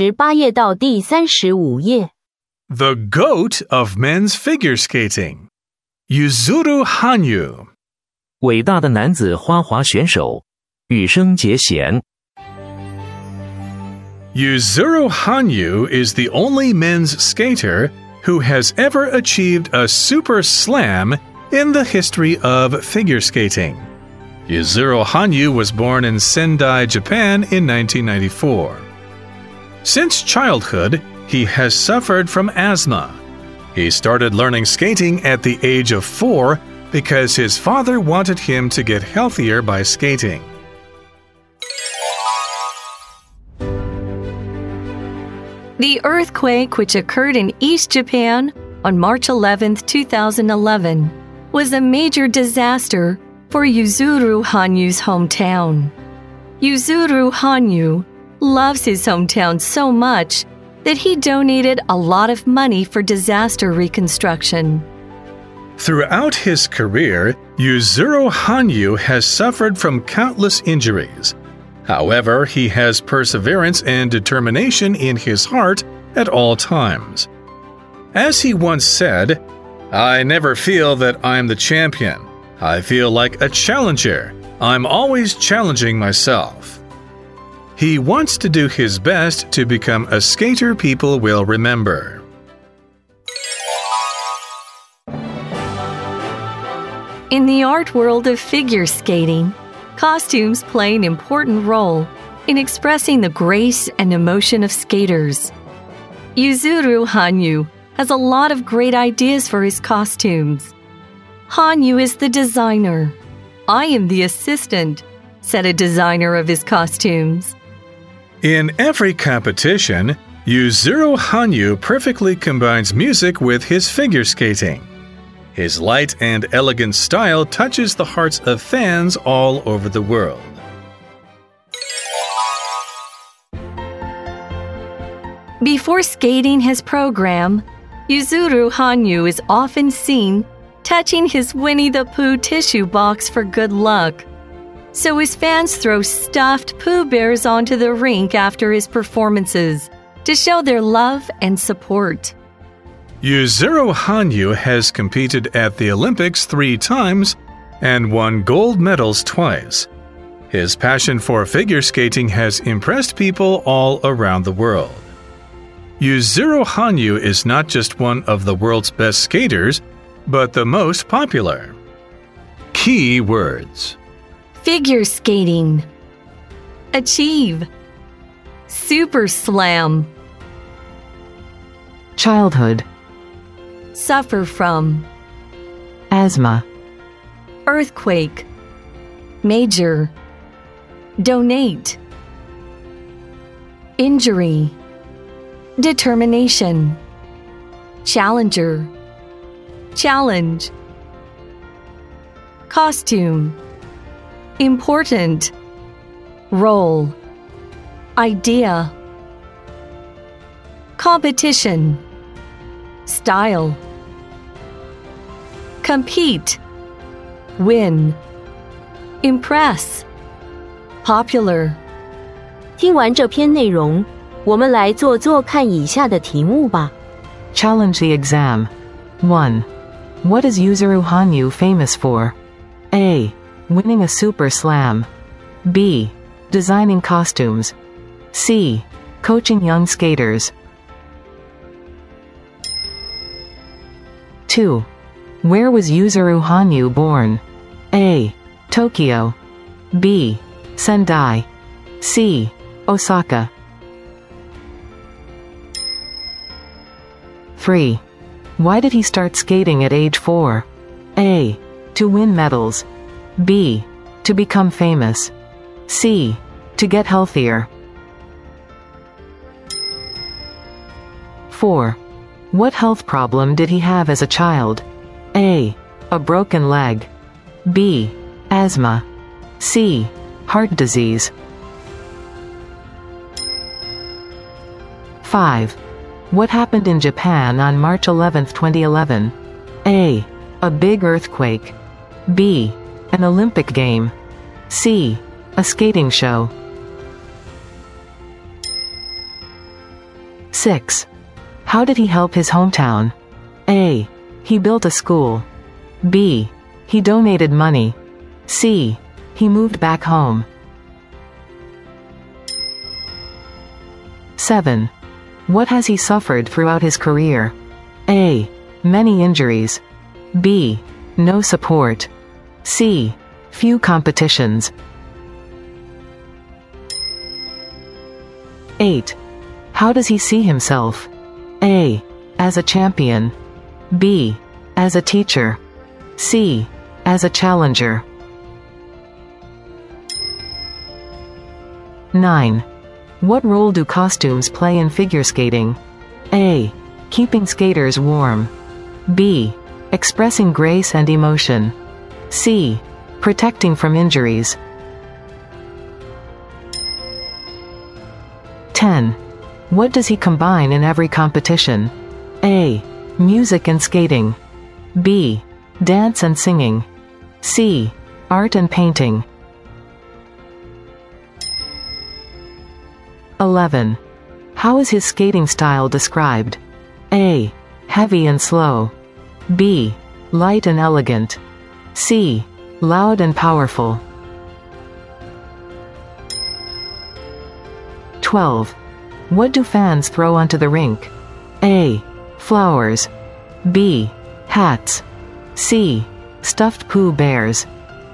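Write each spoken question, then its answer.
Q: What is Yuzuru Hanyu famous for?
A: A: Winning a super slam.

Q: Where was Yuzuru Hanyu born?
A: B: Sendai.

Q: Why did he start skating at age 4?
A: C: To get healthier.

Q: What health problem did he have as a child?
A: B: Asthma.

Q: What happened in Japan on March 11, 2011?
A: A: A big earthquake.

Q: How did he help his hometown?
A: B: He donated money.

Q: What has he suffered throughout his career?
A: A: Many injuries.

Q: How does he see himself?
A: C: As a challenger.

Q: What role do costumes play in figure skating?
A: B: Expressing grace and emotion.

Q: What does he combine in every competition?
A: A: Music and skating.

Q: How is his skating style described?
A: B: Light and elegant.

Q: What do fans throw onto the rink?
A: C: Stuffed Pooh Bears.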